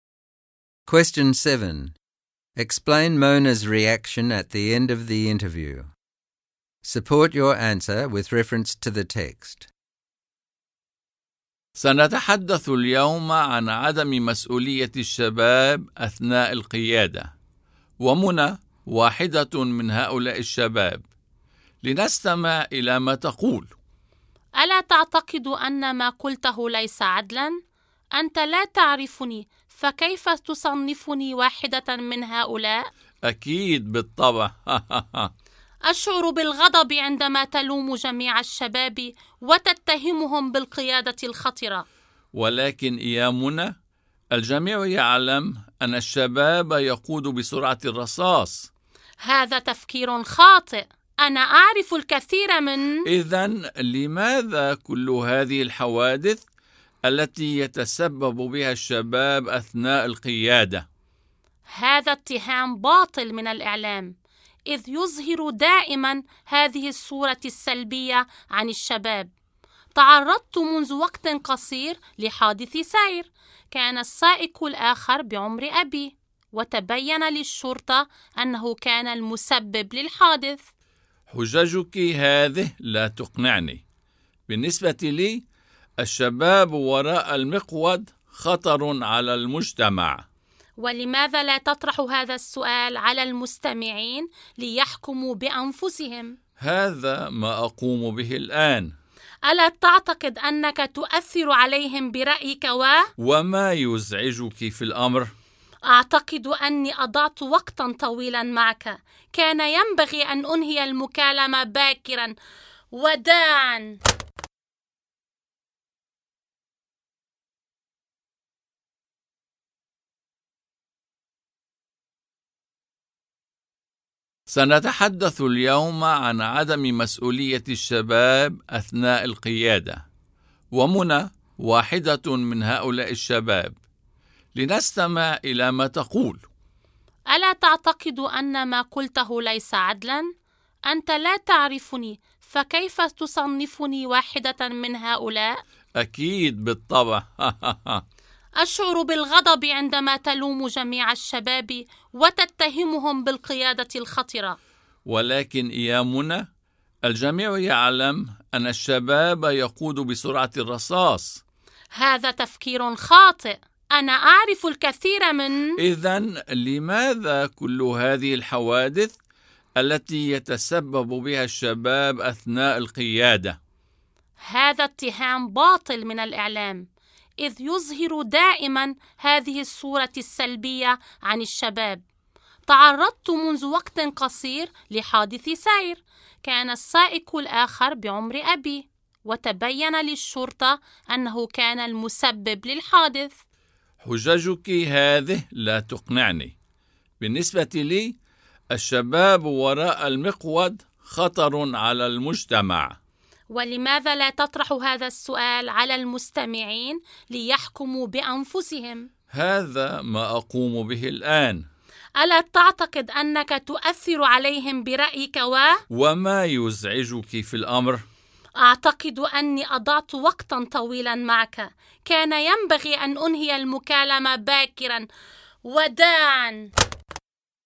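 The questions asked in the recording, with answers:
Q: Explain Mona's reaction at the end of the interview.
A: She gets angry and ends the call. She feels the host is unfair to young drivers, won't listen to her arguments and is pushing his opinion on the listeners, so she decides she has wasted her time.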